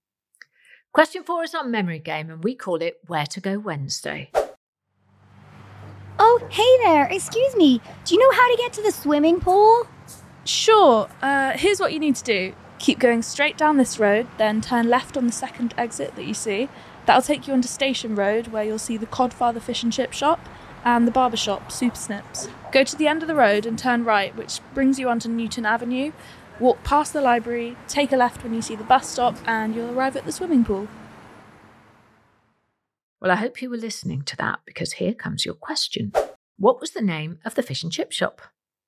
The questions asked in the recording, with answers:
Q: What was the name of the fish and chip shop?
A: it was called the Codfather